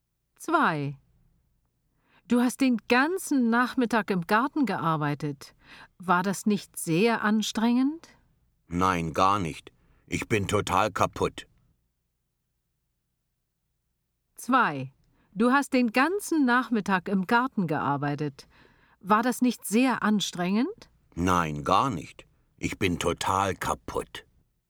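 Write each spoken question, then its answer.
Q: Du hast den ganzen Nachmittag im Garten gearbeitet.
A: U: unlogisch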